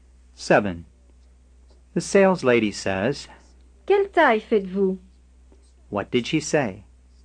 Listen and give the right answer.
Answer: What size do you wear, sir?